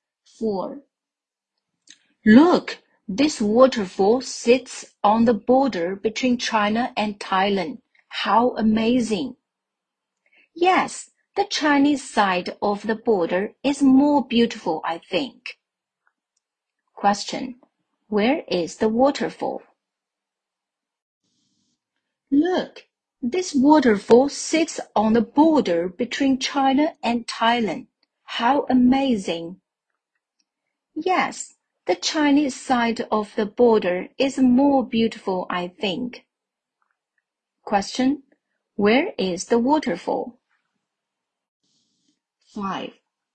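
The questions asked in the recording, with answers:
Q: Where is the waterfall?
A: On the border between China and Thailand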